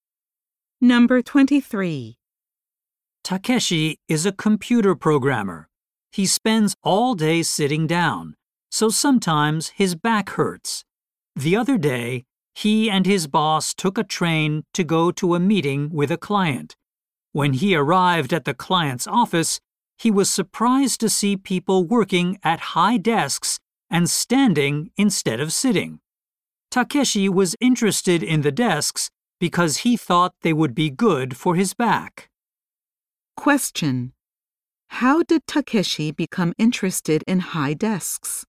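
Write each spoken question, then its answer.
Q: How did Takeshi become interested in high desks?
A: He saw people using them at a client's office.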